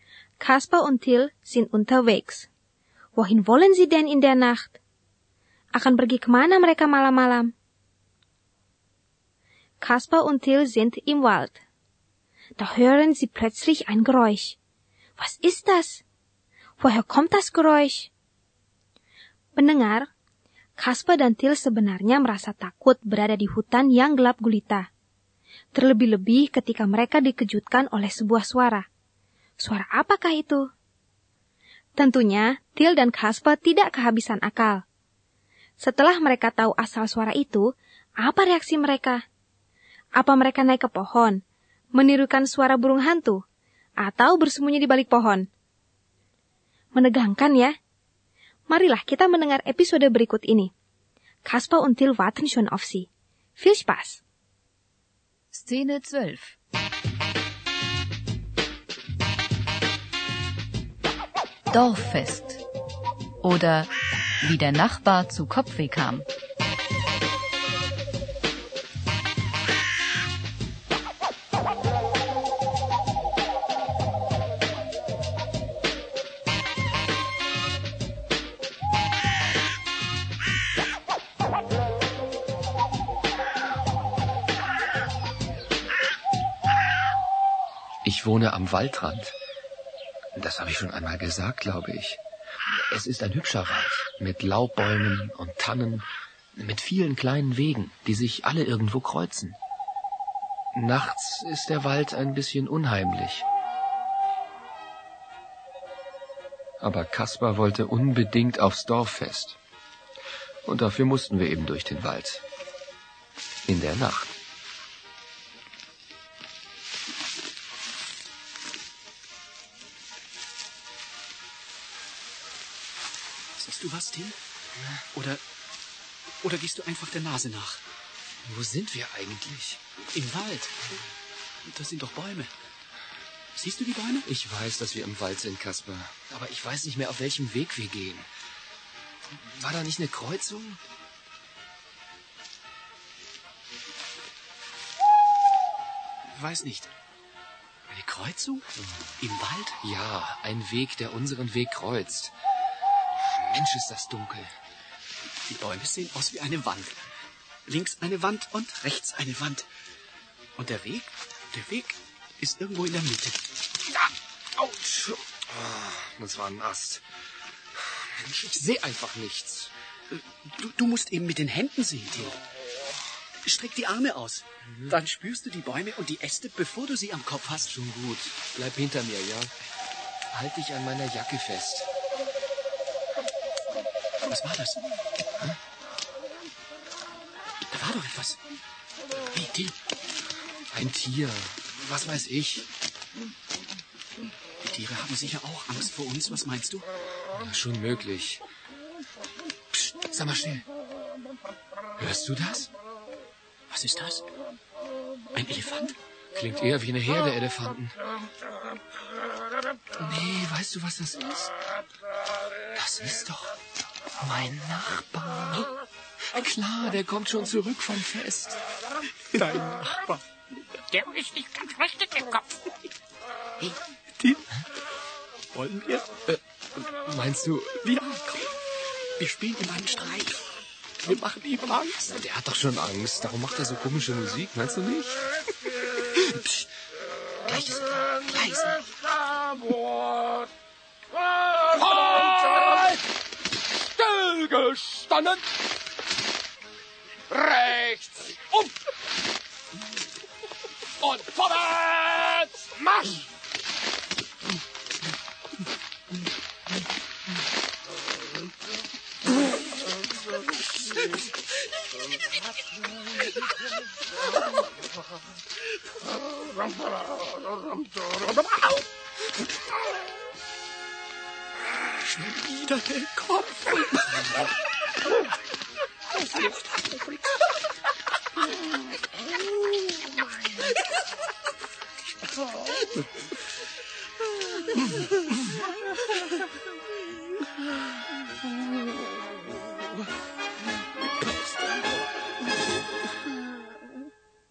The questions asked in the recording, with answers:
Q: Woher kommt das Geräusch?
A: Das Geräusch kommt tatsächlich von dem Nachbarn und nicht von einem Elefanten.